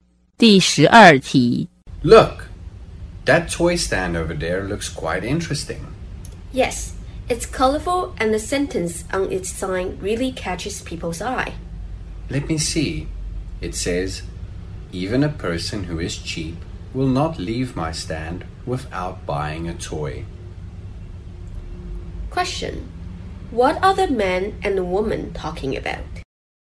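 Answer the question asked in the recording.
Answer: A toy stand and the sentence on its sign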